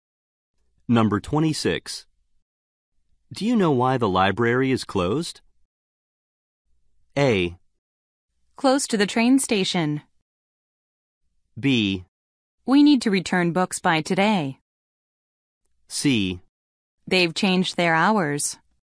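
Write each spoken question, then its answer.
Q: Do you know why the library is closed?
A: C: They've changed their hours.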